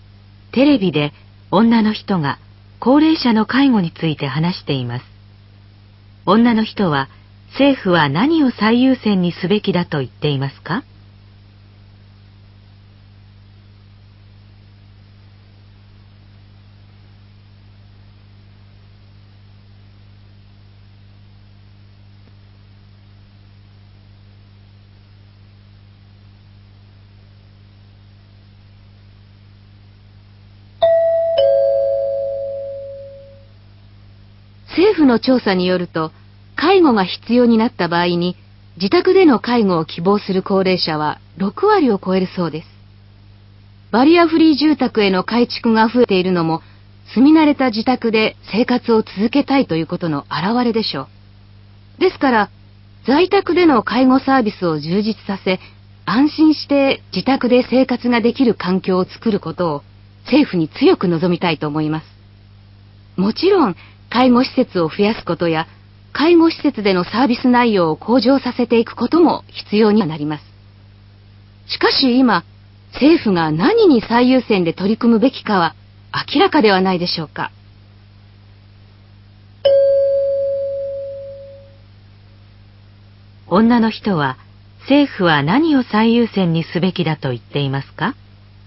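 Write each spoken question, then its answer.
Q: 女の人は、政府は何を最優先にすべきだと言っていますか?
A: 在宅での介護サービスを充実させること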